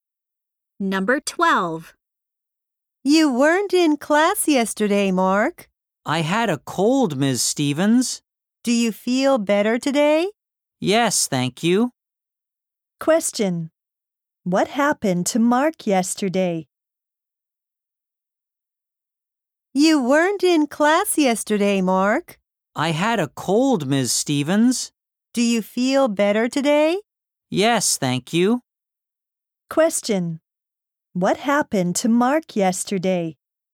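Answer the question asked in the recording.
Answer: He had a cold.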